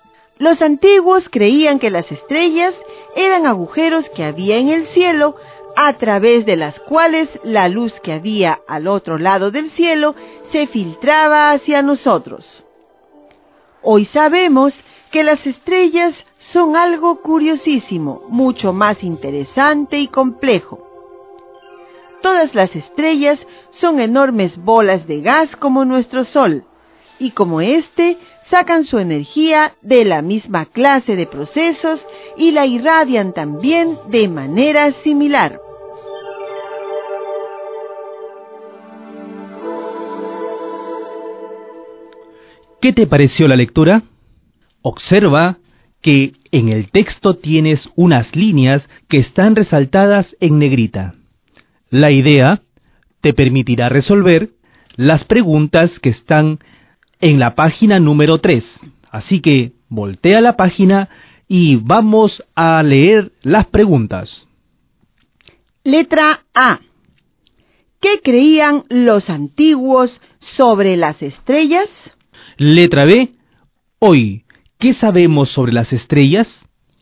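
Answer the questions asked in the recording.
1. Que eran agujeros en el cielo por los que se filtraba la luz
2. Que son enormes bolas de gas como nuestro Sol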